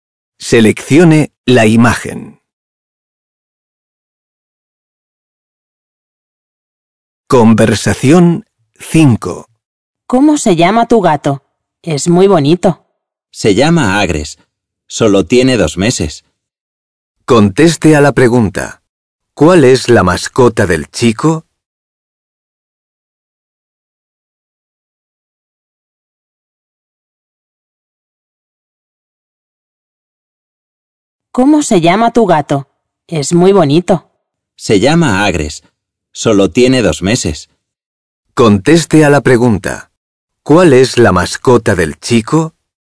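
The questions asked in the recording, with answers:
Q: ¿Cuál es la mascota del chico?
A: un gato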